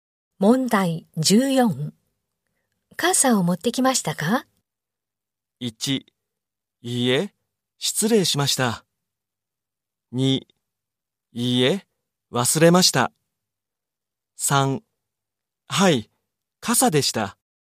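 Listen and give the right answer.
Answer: 2: いいえ、忘れました。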